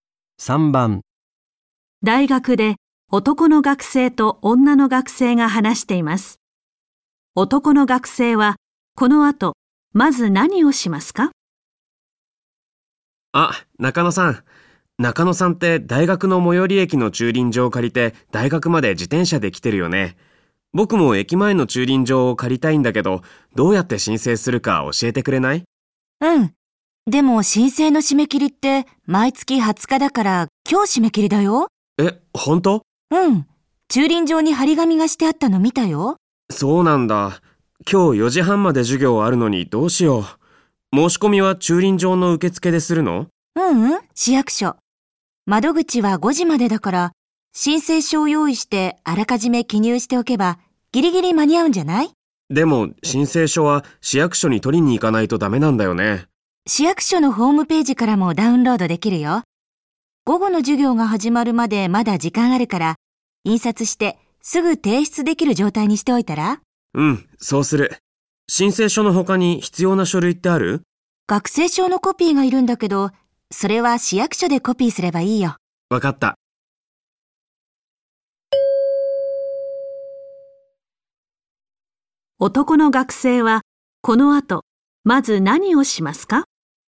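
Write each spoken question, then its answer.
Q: この後まず何をしますか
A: 市役所のホームページから申請書をダウンロードして印刷する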